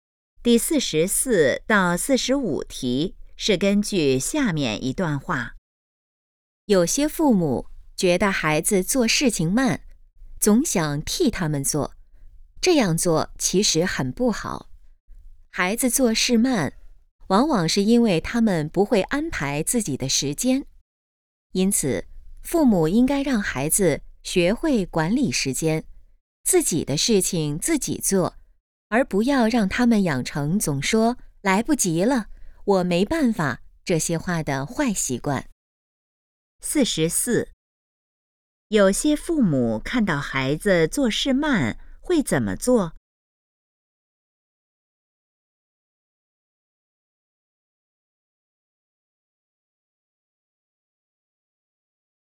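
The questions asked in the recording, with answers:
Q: 有些父母看到孩子做事慢会怎么做?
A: 替他们做

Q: 根据这段话,应让孩子养成什么好习惯?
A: 管理时间,自己的事情自己做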